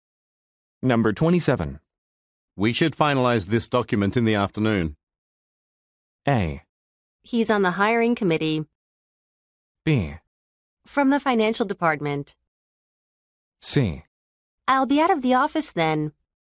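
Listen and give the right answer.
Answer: C: I'll be out of the office then.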